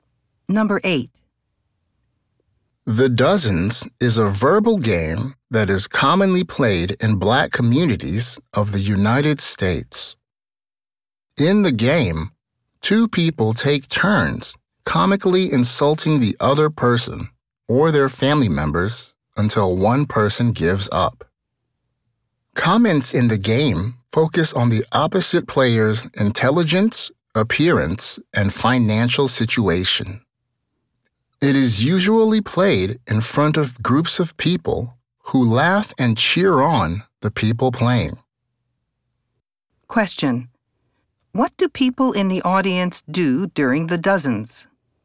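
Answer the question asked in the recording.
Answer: They laugh and cheer on the people playing.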